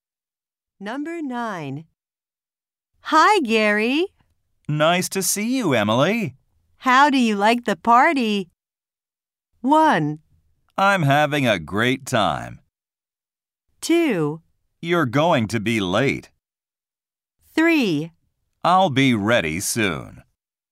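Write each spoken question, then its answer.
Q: How do you like the party?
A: 1: I'm having a great time.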